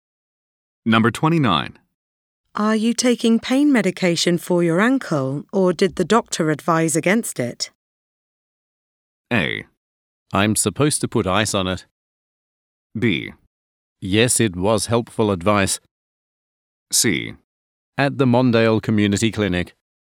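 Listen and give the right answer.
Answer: A: I'm supposed to put ice on it.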